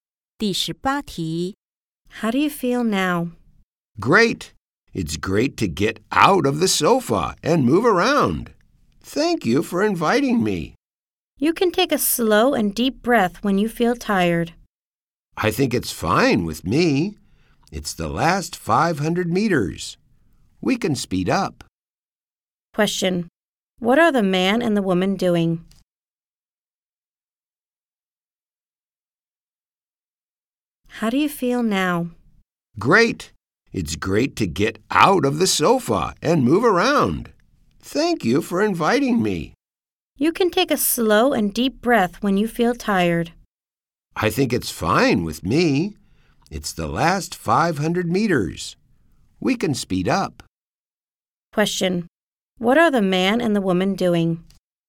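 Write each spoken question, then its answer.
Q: What are the man and the woman doing?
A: Running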